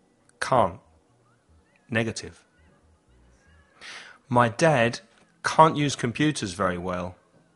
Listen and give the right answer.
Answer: Can't. Negative.